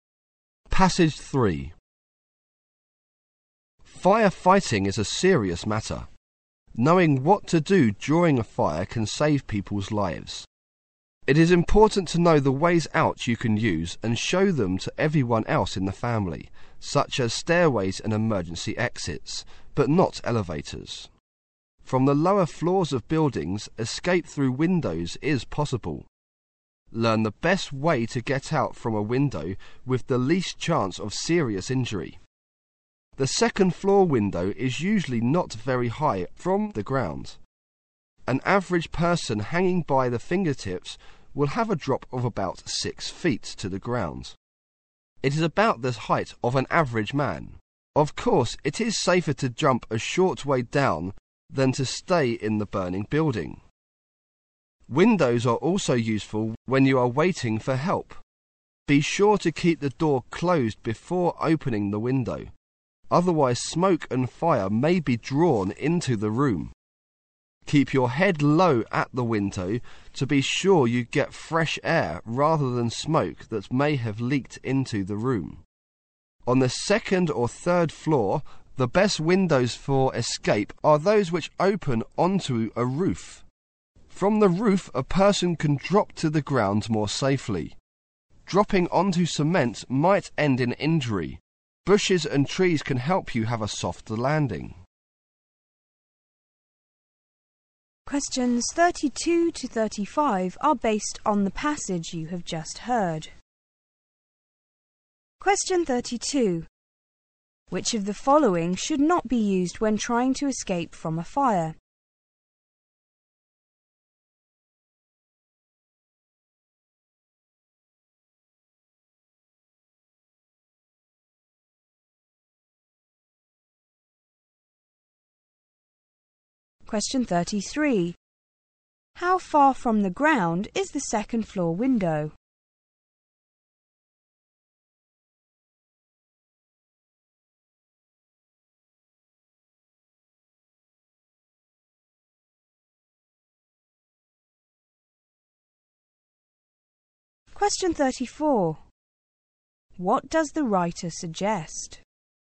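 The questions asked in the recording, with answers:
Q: Which of the following should not be used when trying to escape from a fire?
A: Elevators

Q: How far from the ground is the second floor window?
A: Not very high; about a 6-foot drop when hanging by the fingertips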